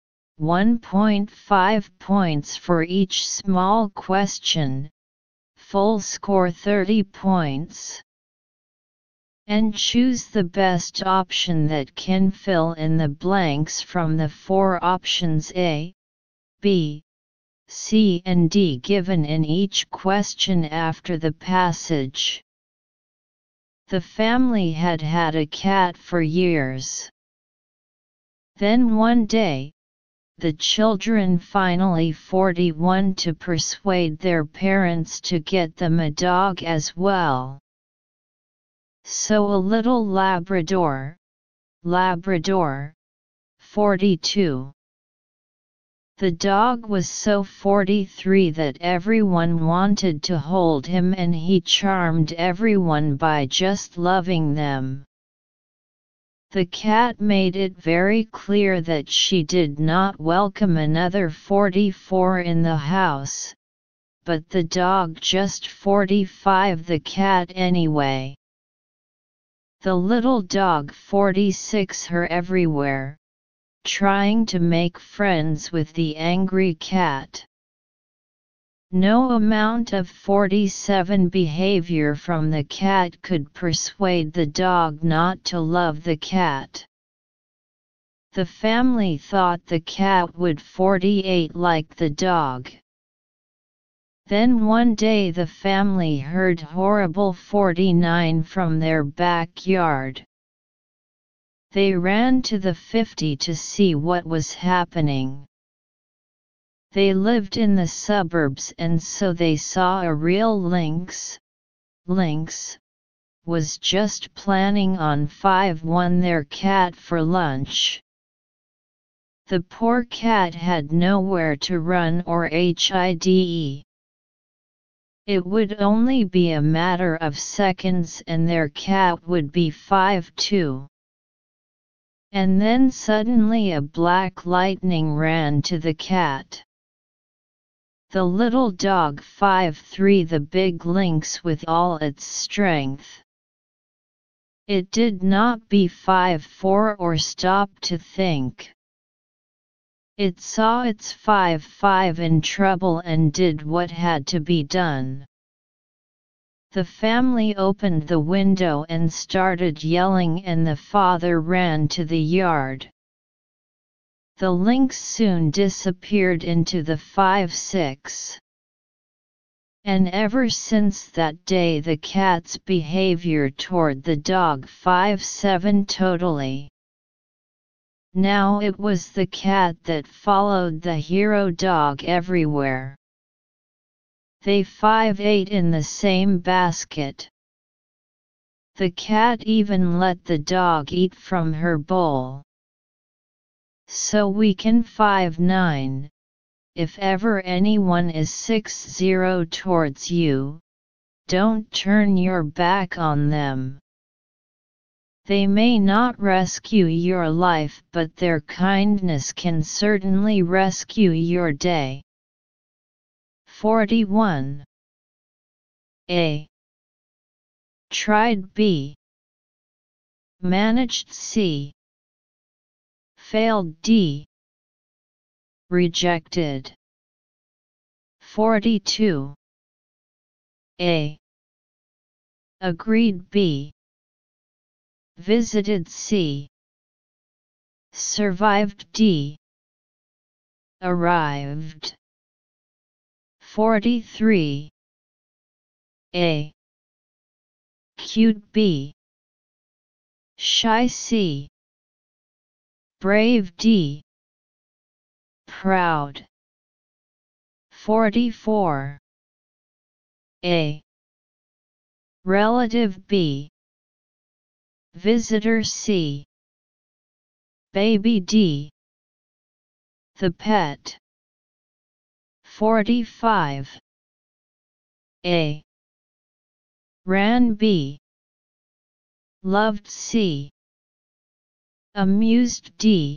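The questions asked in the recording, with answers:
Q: Then one day, the children finally 41 to persuade their parents to get them a dog as well.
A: B: Managed

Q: So a little Labrador, Labrador, 42.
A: D: Arrived

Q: The dog was so 43 that everyone wanted to hold him and he charmed everyone by just loving them.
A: A: Cute

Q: The cat made it very clear that she did not welcome another 44 in the house, but the dog just 45 the cat anyway.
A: D: The pet

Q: The cat made it very clear that she did not welcome another 44 in the house, but the dog just 45 the cat anyway.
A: B: Loved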